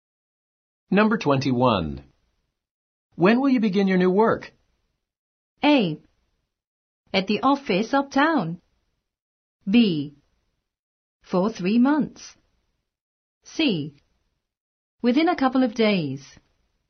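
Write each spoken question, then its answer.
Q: When will you begin your new work?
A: C: Within a couple of days.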